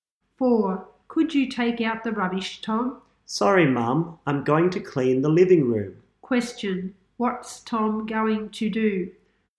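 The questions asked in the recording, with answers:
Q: What's Tom going to do?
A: Clean the living room.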